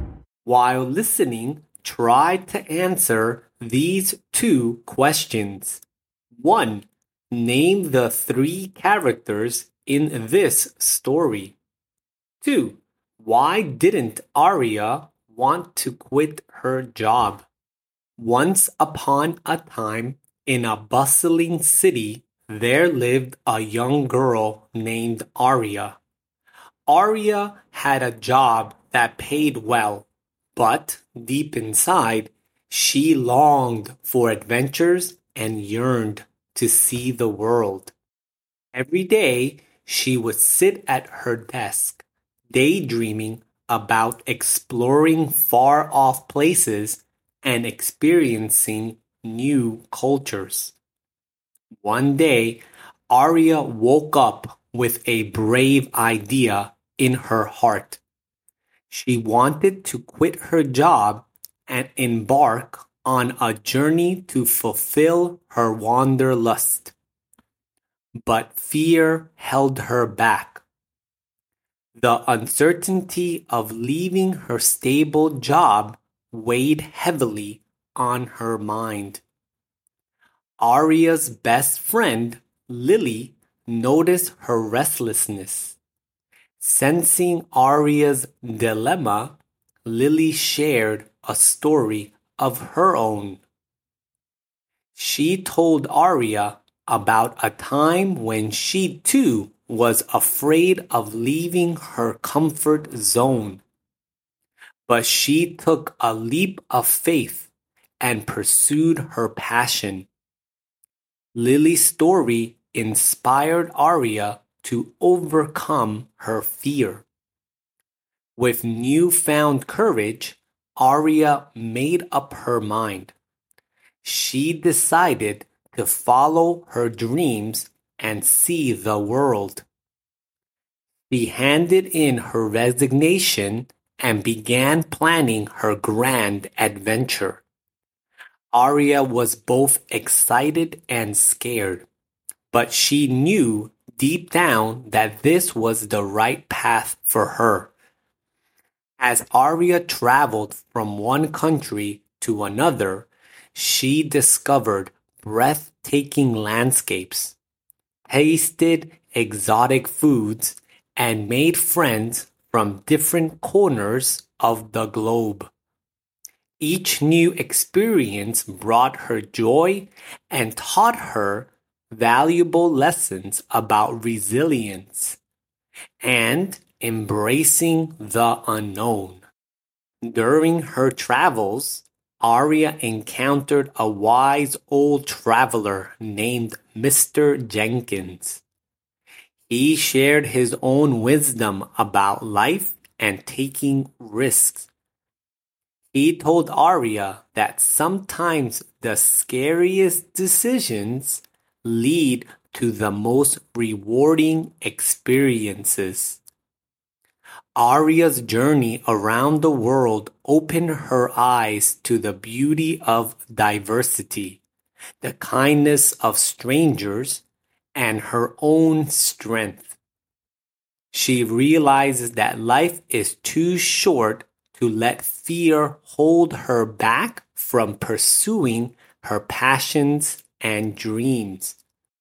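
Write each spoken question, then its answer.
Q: Name the three characters in this story.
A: Aria, Lily and Mr. Jenkins

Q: Why didn't Aria want to quit her job?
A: Fear: she was afraid of leaving her stable job, which paid well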